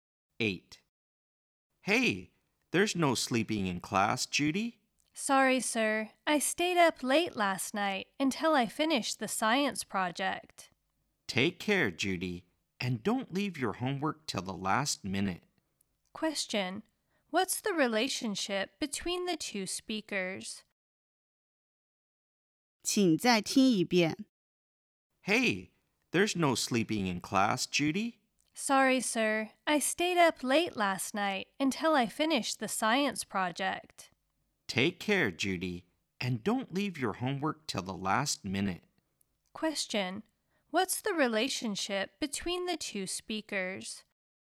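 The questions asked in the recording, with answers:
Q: What's the relationship between the two speakers?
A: Teacher and student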